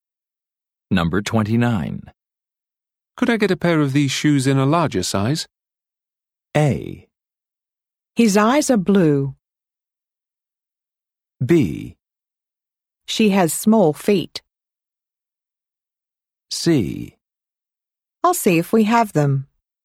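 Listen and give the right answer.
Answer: C: I'll see if we have them.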